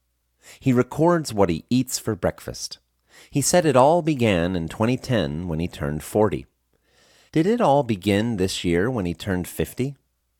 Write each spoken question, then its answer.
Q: Did it all begin this year when he turned 50?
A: No, it didn't all begin this year when he turned 50.